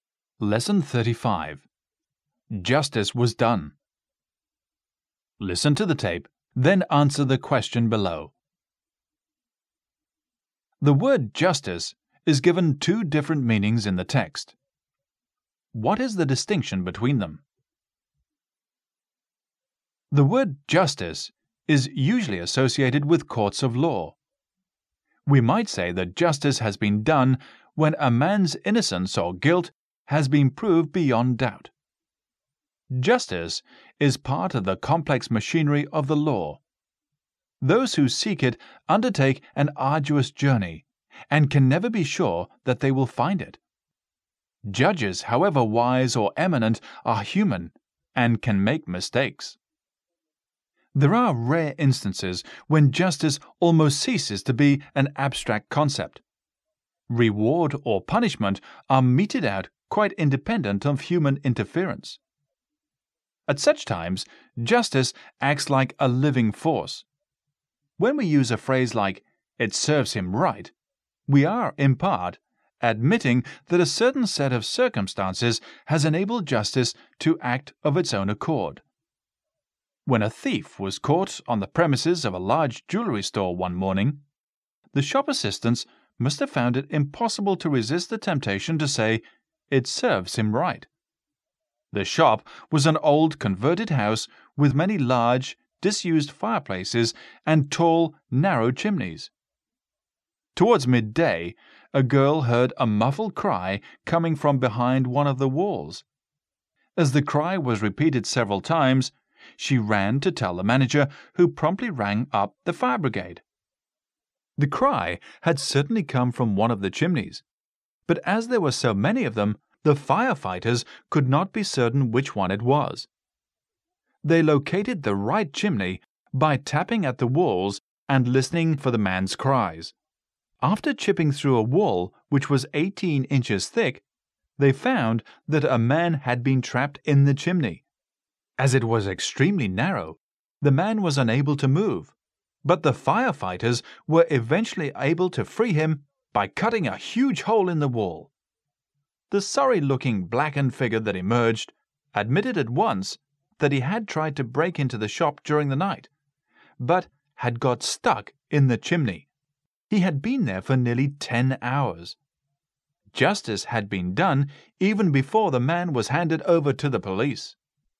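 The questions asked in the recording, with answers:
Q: The word justice is given two different meanings in the text. What is the distinction between them?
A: Justice in courts of law, decided by humans, versus justice acting of its own accord, independent of human interference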